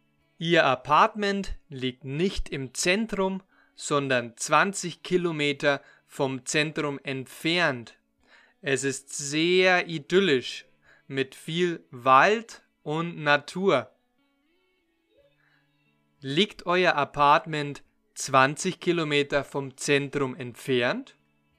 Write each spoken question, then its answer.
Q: Liegt euer Apartment 20 Kilometer vom Zentrum entfernt?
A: Ja, unser Apartment liegt nicht im Zentrum, sondern 20 Kilometer davon entfernt.